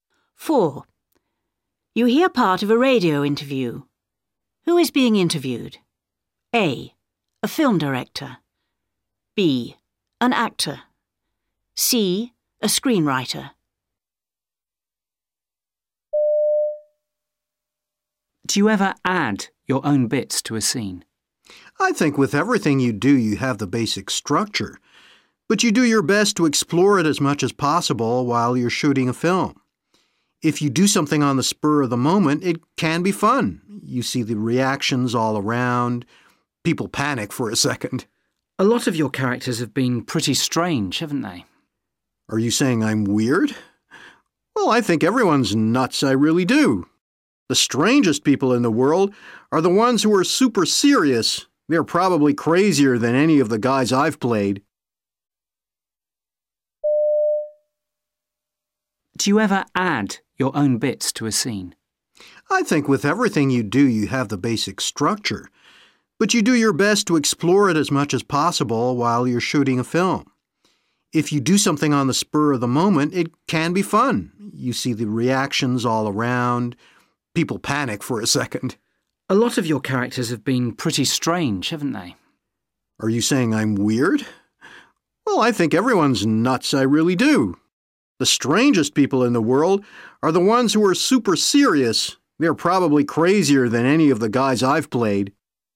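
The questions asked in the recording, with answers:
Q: Who is being interviewed?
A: B: An actor.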